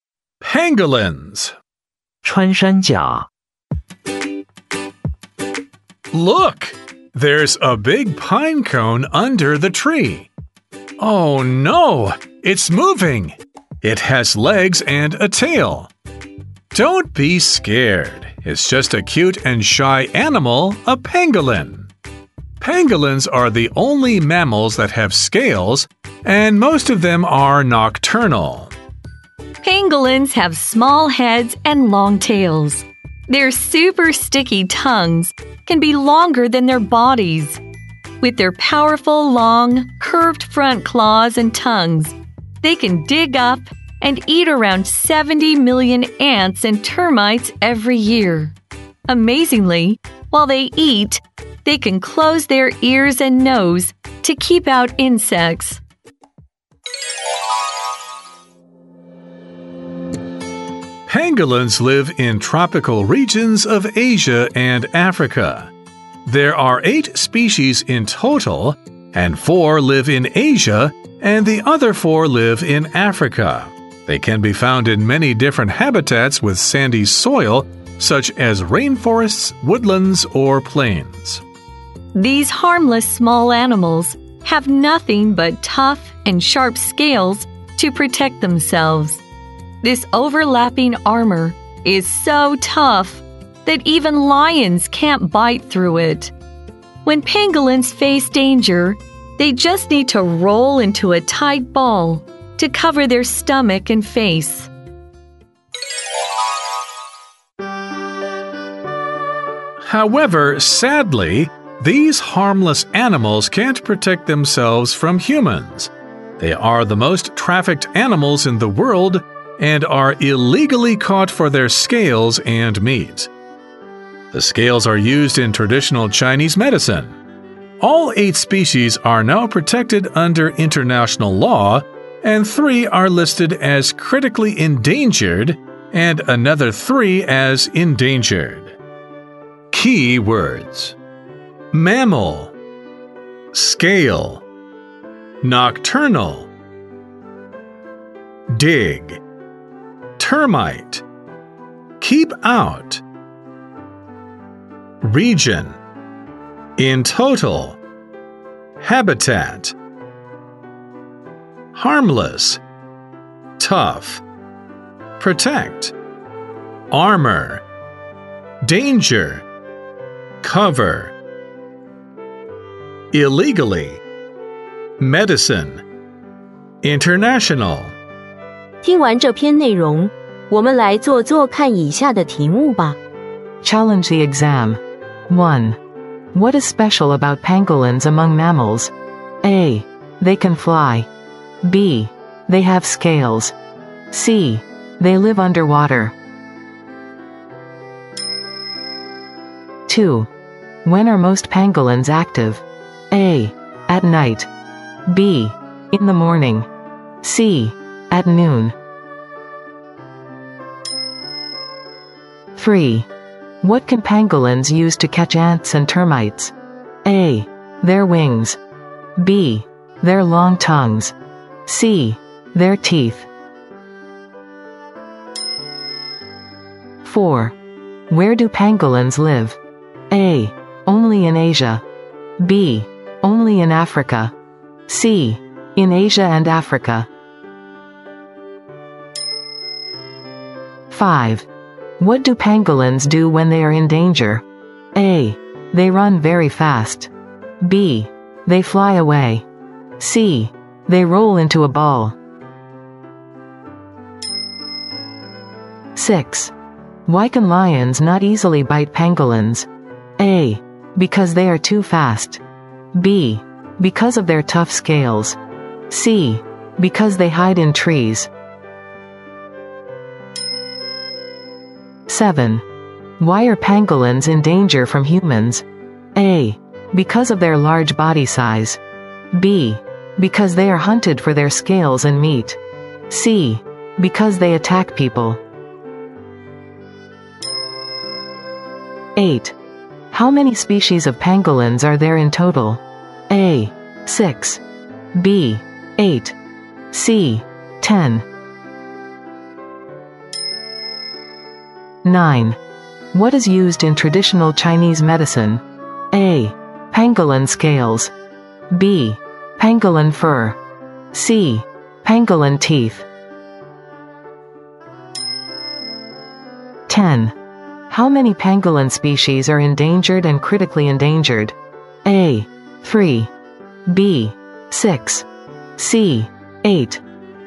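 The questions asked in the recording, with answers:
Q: What is special about pangolins among mammals?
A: B: They have scales.

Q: When are most pangolins active?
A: A: At night.

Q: What can pangolins use to catch ants and termites?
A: B: Their long tongues.

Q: Where do pangolins live?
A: C: In Asia and Africa.

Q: What do pangolins do when they are in danger?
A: C: They roll into a ball.

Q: Why can lions not easily bite pangolins?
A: B: Because of their tough scales.

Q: Why are pangolins in danger from humans?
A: B: Because they are hunted for their scales and meat.

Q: How many species of pangolins are there in total?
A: B: 8.

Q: What is used in traditional Chinese medicine?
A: A: Pangolin scales.

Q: How many pangolin species are endangered and critically endangered?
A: B: 6.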